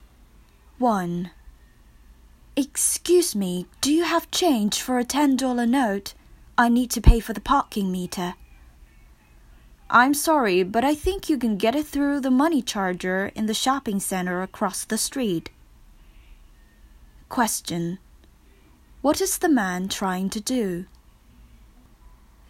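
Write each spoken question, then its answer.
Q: What is the man trying to do?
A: Get change for a $10 note to pay the parking meter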